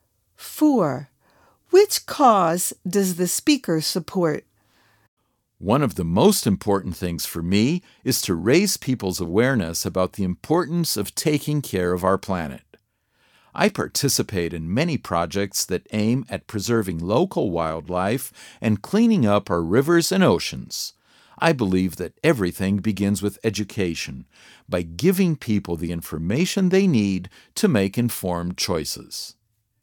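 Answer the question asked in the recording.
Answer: Protecting the environment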